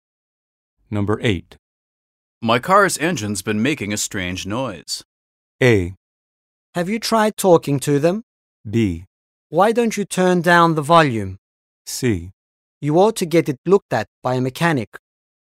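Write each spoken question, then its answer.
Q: My car's engine's been making a strange noise.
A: C: You ought to get it looked at by a mechanic.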